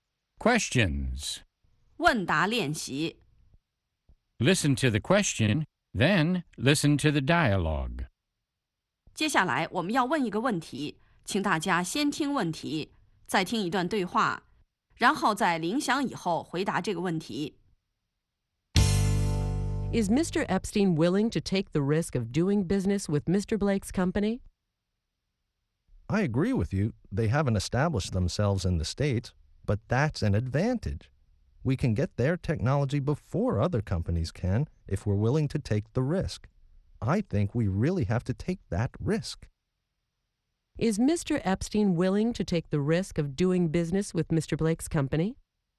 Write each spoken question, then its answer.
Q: Is Mr. Epstein willing to take the risk of doing business with Mr. Blake's company?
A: Yes, he is. He thinks they really have to take that risk.